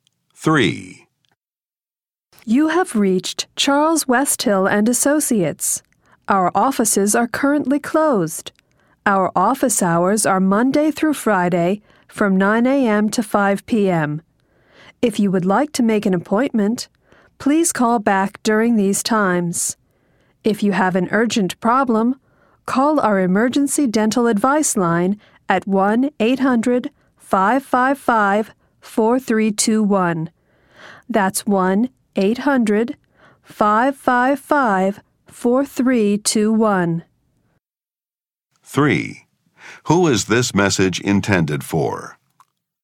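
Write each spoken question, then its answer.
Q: Who is this message intended for?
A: Callers to a dental office (patients)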